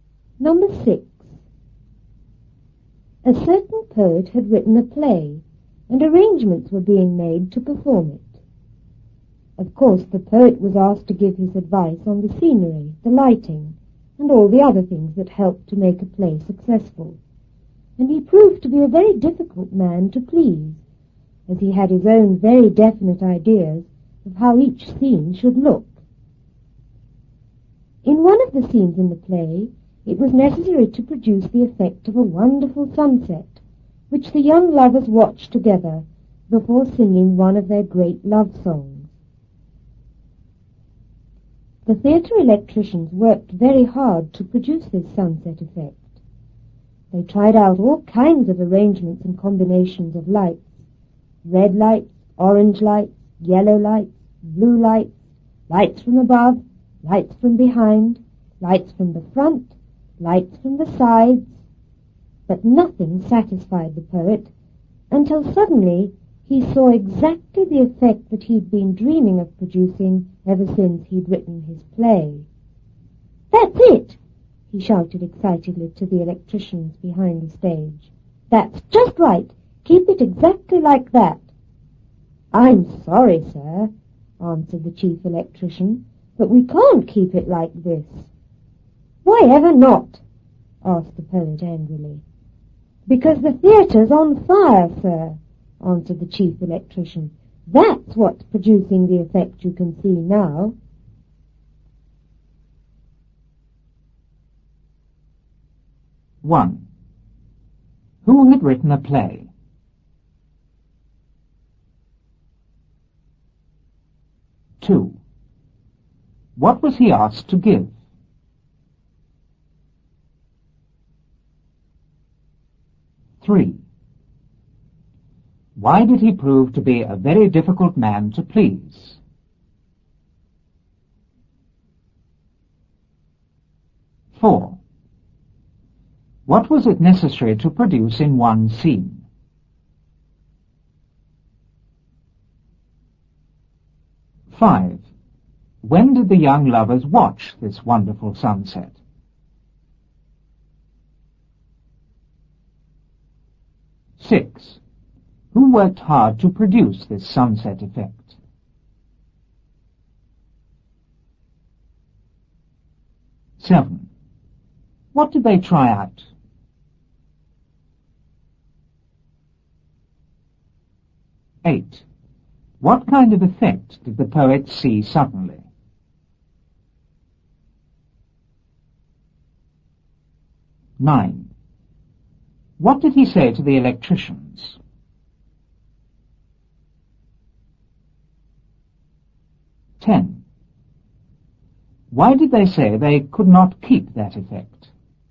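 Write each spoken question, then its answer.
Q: Who had written a play?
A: A certain poet

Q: What was he asked to give?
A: His advice on the scenery, the lighting and other things

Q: Why did he prove to be a very difficult man to please?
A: He had his own very definite ideas of how each scene should look

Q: What was it necessary to produce in one scene?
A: The effect of a wonderful sunset

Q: When did the young lovers watch this wonderful sunset?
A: Before singing one of their great love songs

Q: Who worked hard to produce this sunset effect?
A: The theatre electricians

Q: What did they try out?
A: All kinds of arrangements and combinations of lights

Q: What kind of effect did the poet see suddenly?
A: Exactly the effect he had been dreaming of since writing the play

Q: What did he say to the electricians?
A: That's it! That's just right! Keep it exactly like that!

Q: Why did they say they could not keep that effect?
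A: Because the theatre was on fire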